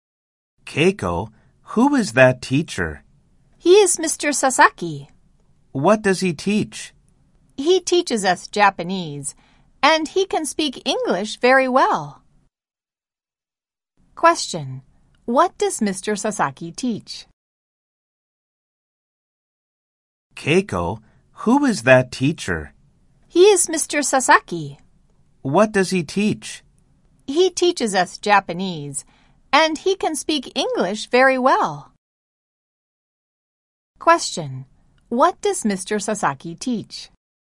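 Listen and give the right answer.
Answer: Japanese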